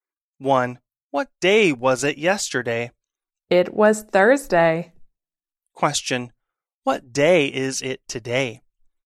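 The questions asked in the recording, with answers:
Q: What day is it today?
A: Friday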